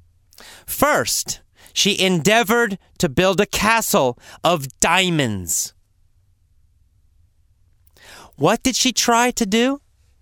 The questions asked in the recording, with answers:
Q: What did she try to do?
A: She tried to build a castle out of diamonds.